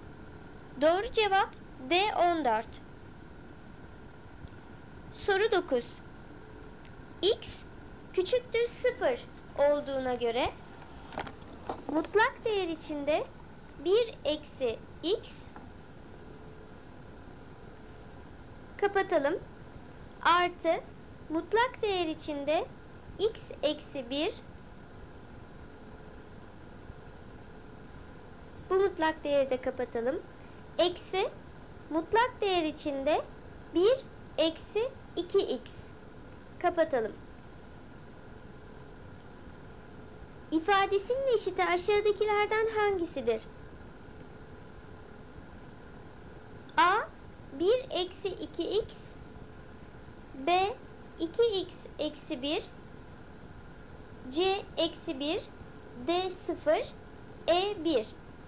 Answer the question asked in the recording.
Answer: Doğru cevap E1.